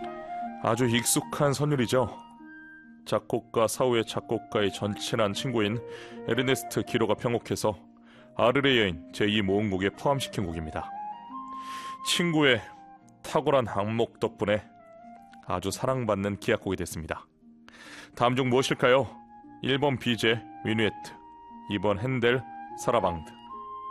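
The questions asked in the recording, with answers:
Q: 다음 중 무엇일까요? 1번 비제, 미누에트, 2번 핸델, 사라방드.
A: 1: 비제, 미누에트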